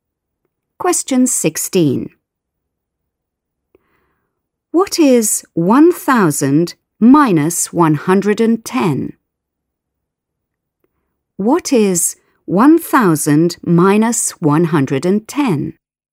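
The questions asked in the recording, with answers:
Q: What is 1,000 minus 110?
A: 890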